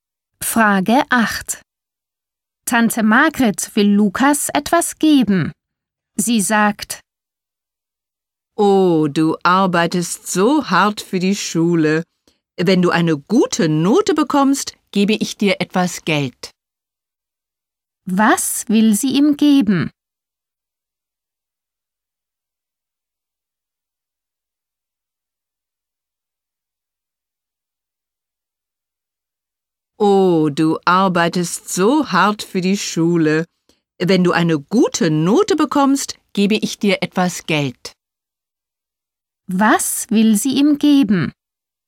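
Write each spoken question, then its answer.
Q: Was will sie ihm geben?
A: Geld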